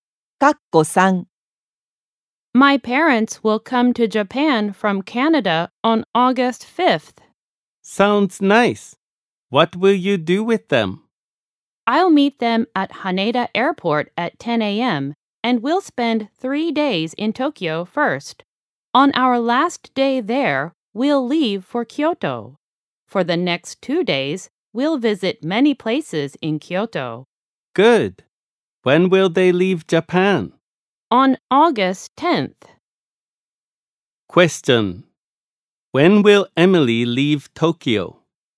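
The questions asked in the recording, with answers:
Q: When will Emily leave Tokyo?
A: On August 7th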